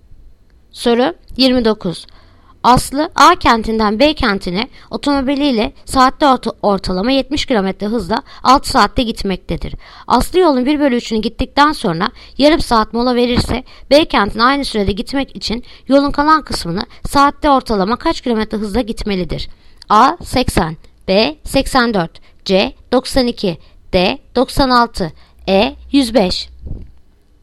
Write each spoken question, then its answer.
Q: Aslı yolun 1/3'ünü gittikten sonra yarım saat mola verirse B kentine aynı sürede gitmek için yolun kalan kısmını saatte ortalama kaç km hızla gitmelidir?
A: Yanıt Adana 80.